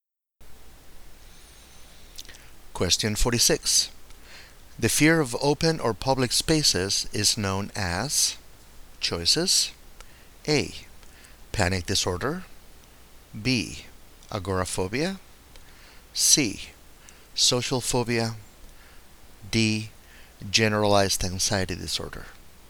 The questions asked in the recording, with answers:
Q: The fear of open or public spaces is known as...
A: And the correct choice here is B.